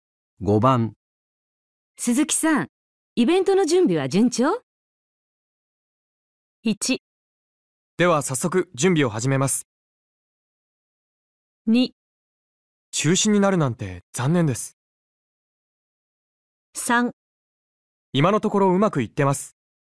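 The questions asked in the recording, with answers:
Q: 鈴木さん、イベントの準備は順調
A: 3: 今のところうまくいってます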